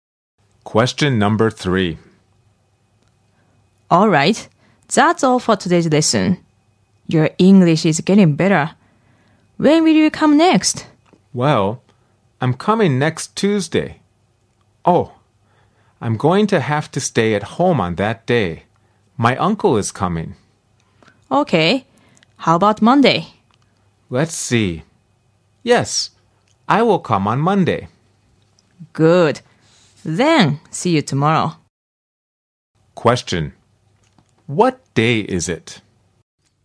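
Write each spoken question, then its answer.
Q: What day is it?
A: Sunday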